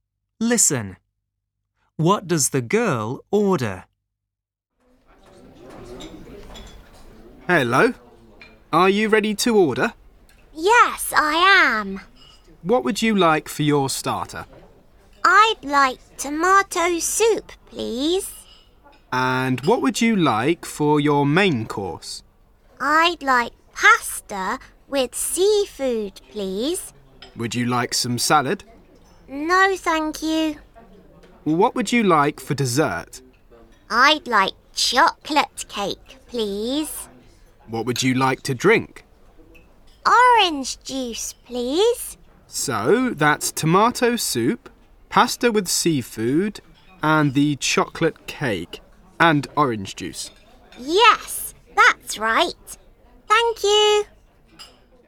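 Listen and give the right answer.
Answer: Tomato soup, pasta with seafood, chocolate cake and orange juice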